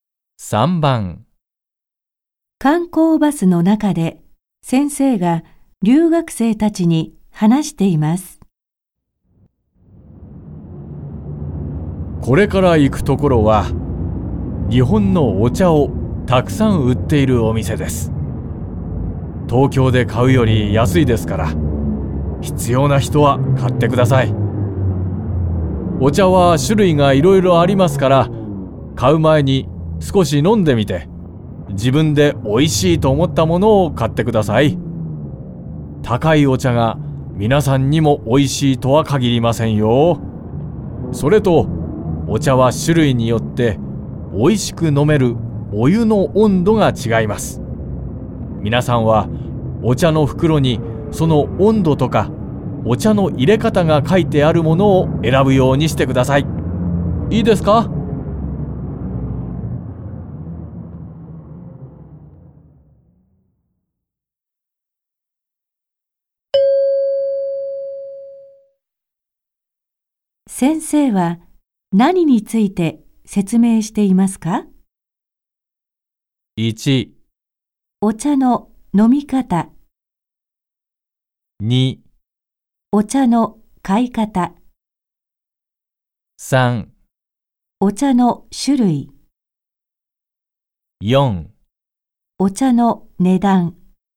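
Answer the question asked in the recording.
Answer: 2: お茶の買い方。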